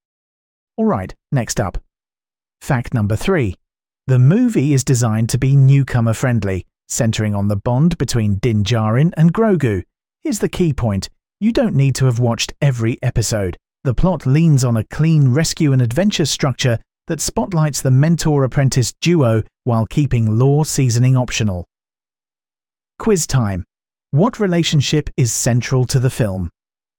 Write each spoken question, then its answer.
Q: What relationship is central to the film?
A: Correct answer. Din Djarin and Grogu.